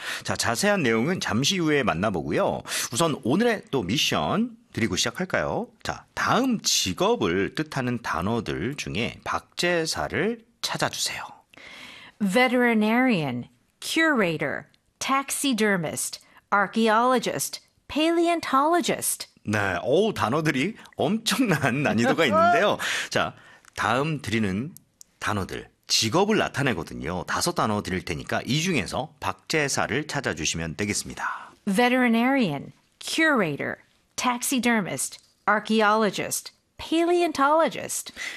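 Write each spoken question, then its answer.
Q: 자, 다음 직업을 뜻하는 단어들 중에 박제사를 찾아주세요.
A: taxidermist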